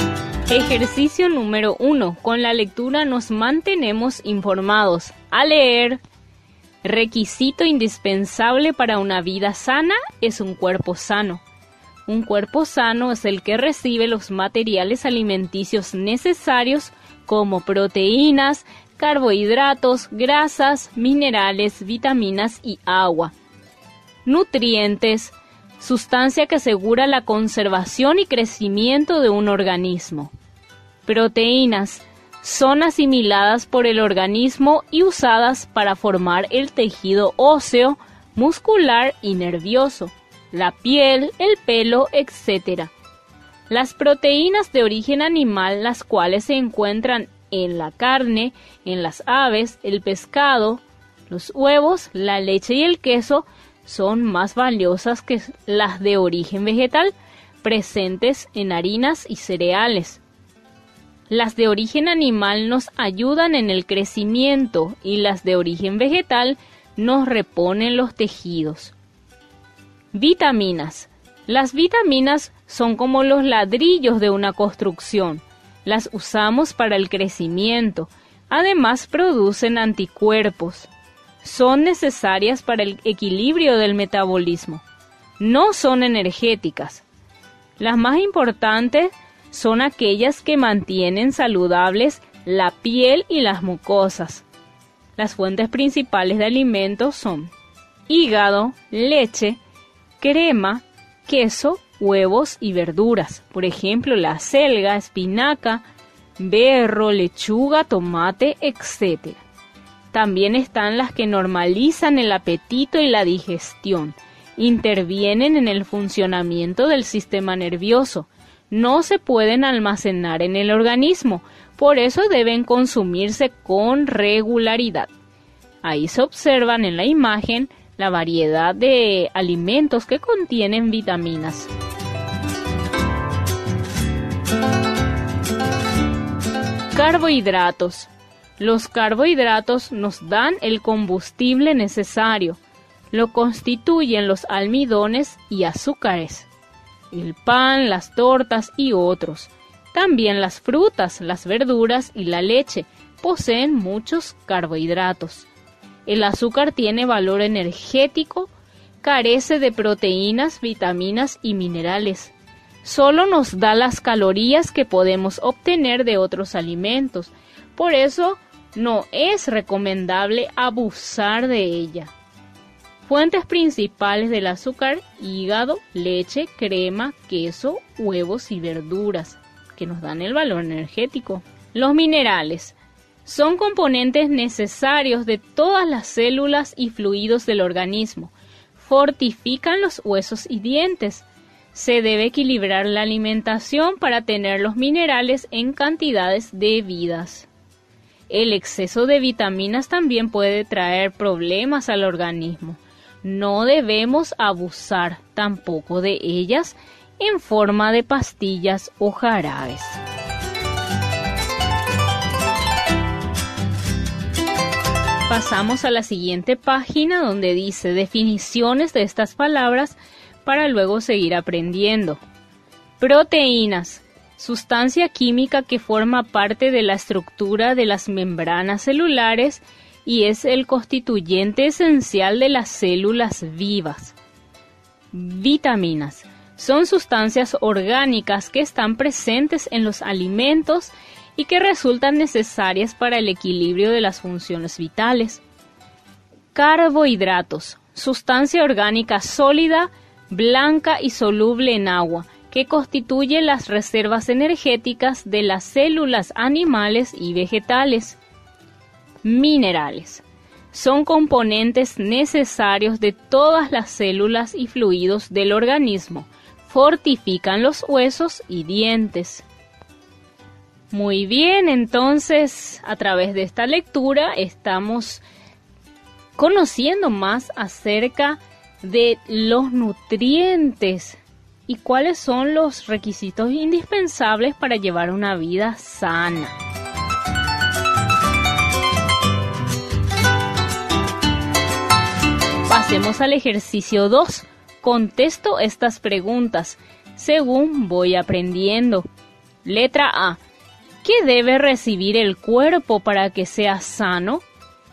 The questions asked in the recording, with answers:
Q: ¿Qué debe recibir el cuerpo para que sea sano?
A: un cuerpo sano es el que recibe los materiales alimenticios necesarios como proteínas, carbohidratos